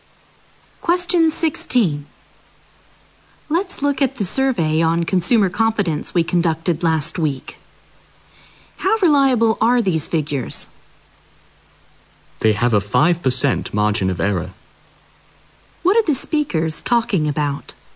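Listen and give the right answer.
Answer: Last week's consumer confidence survey and how reliable its figures are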